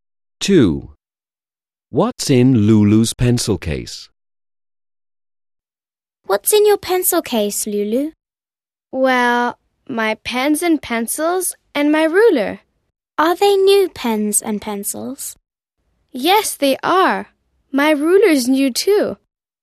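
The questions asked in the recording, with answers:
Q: What's in Lulu's pencil case?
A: Her pens, pencils and ruler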